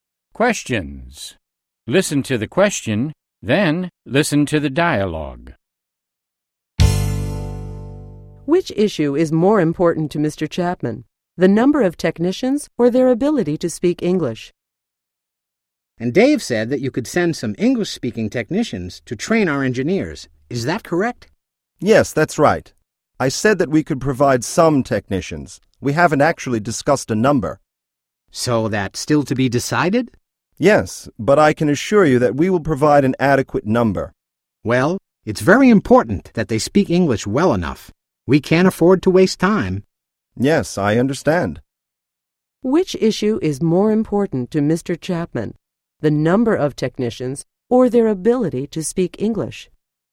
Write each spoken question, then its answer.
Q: Which issue is more important to Mr. Chapman, the number of technicians or their ability to speak English?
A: He is more concerned about their ability to speak English.